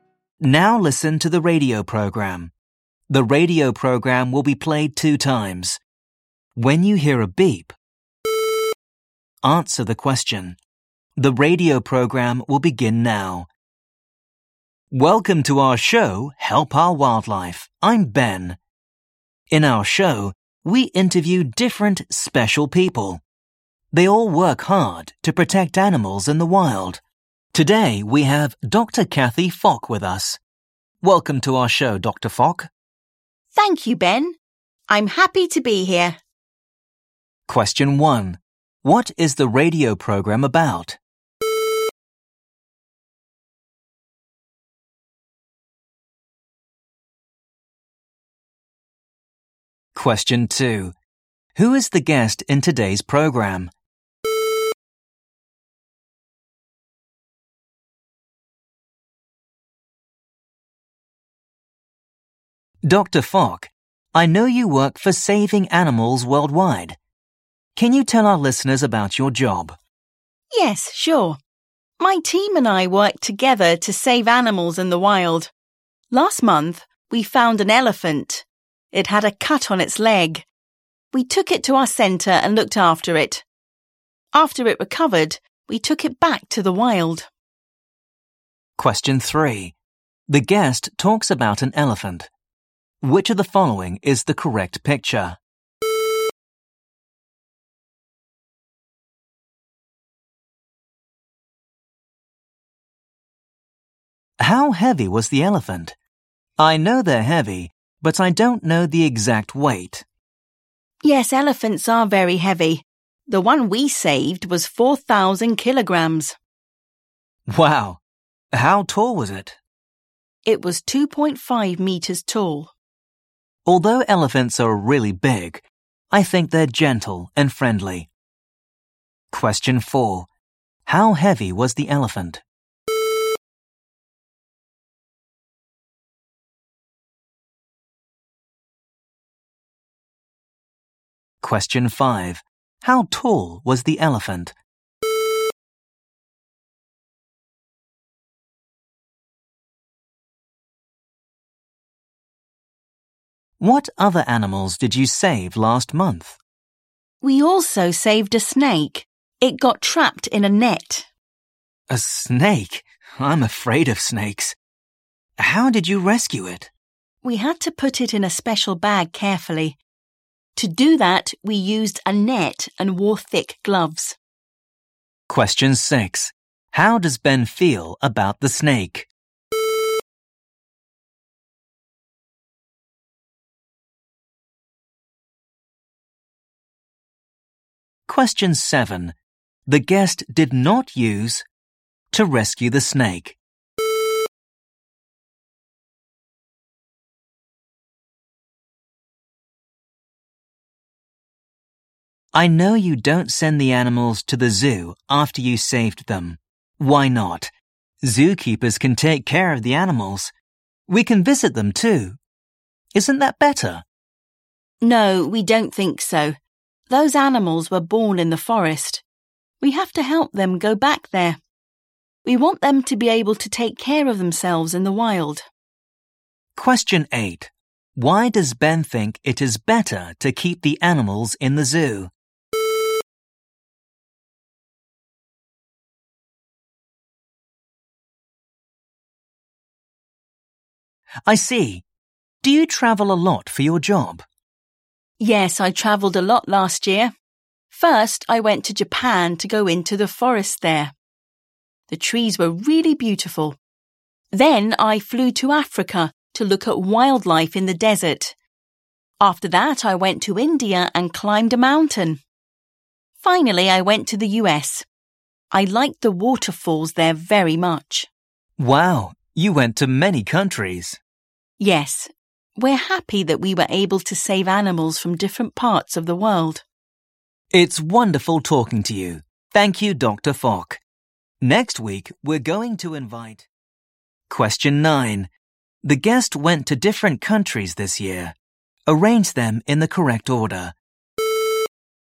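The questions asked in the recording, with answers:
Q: What is the radio program about?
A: Helping/protecting wildlife (Help Our Wildlife)

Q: Who is the guest in today's program?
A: Dr. Kathy Fock

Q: How heavy was the elephant?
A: 4,000 kilograms

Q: How tall was the elephant?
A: 2.5 meters

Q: How does Ben feel about the snake?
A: He is afraid of snakes

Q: Why does Ben think it is better to keep the animals in the zoo?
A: Zookeepers can take care of them and people can visit them

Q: The guest went to different countries this year.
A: Japan, Africa, India, the US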